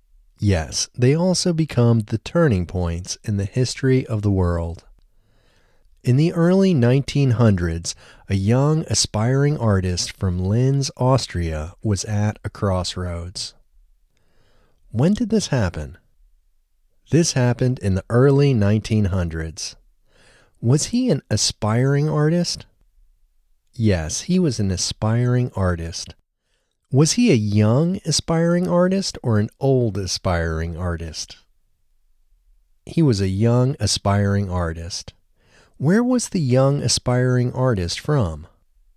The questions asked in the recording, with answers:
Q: Where was the young aspiring artist from?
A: The young aspiring artist was from Linz, Austria.